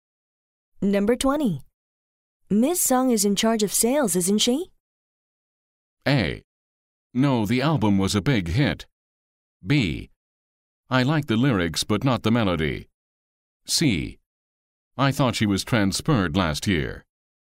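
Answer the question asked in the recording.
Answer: C: I thought she was transferred last year.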